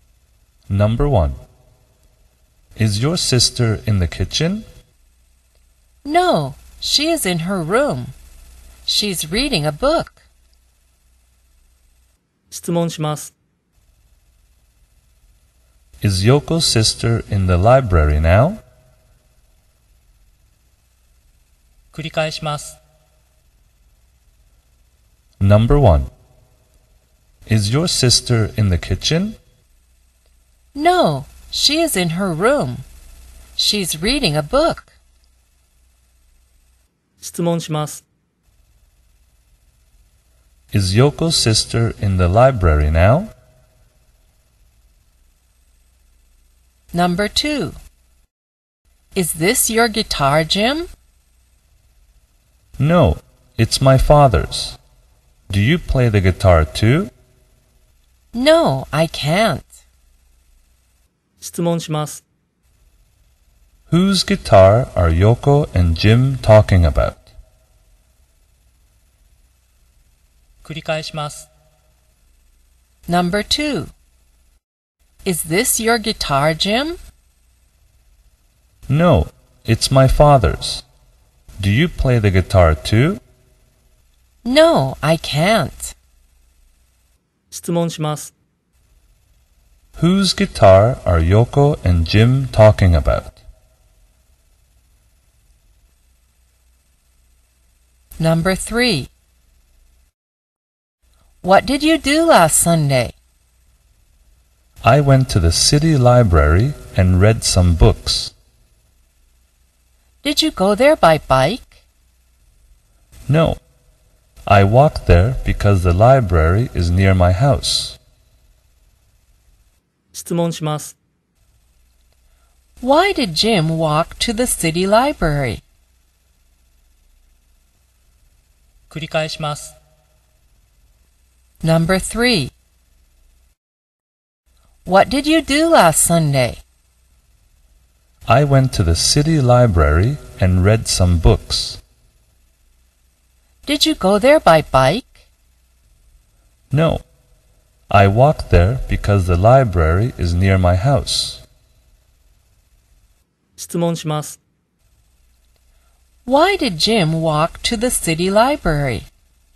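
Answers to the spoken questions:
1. No, she isn't. She is in her room.
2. Jim's father's guitar
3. Because the library is near his house.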